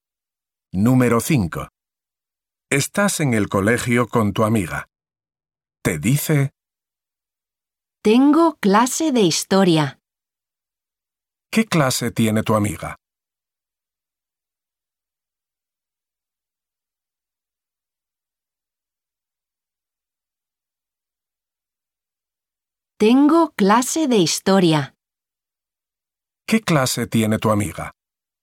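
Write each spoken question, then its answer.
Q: ¿Qué clase tiene tu amiga?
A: Historia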